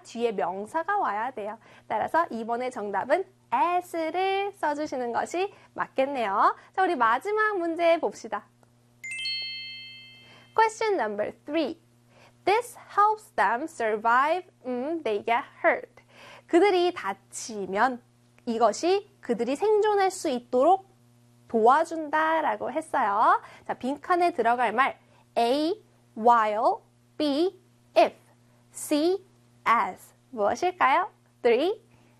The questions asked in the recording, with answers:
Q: 자, 빈칸에 들어갈 말 A, while, B, if, C, as 무엇일까요?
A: 그렇죠. B에 if를 써주시면 되겠죠.